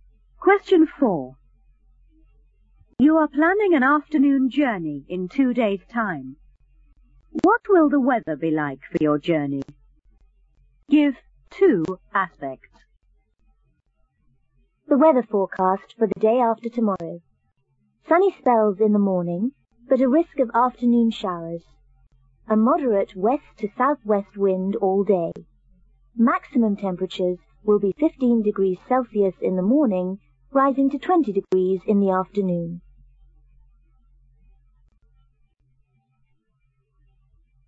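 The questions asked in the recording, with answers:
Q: What will the weather be like for your journey?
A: Risk of showers, moderate west to southwest wind, 20 degrees Celsius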